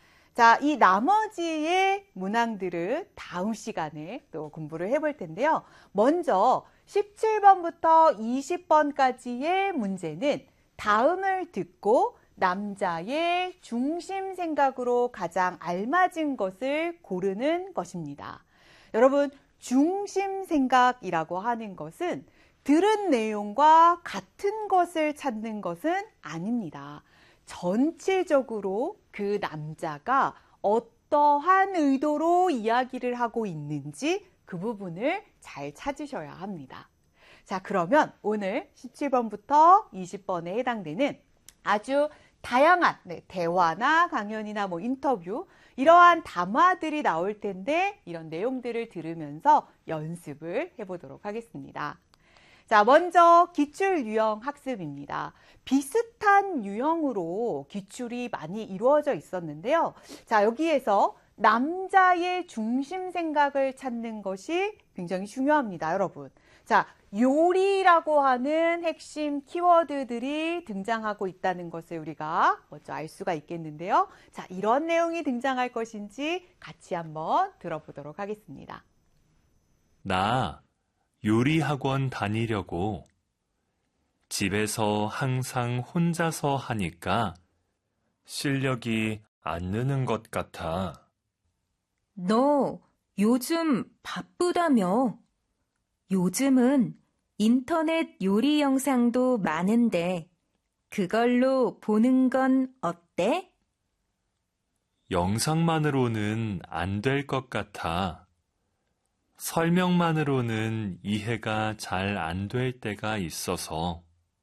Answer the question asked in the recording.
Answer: 1번, 요리를 제대로 배워서 하고 싶다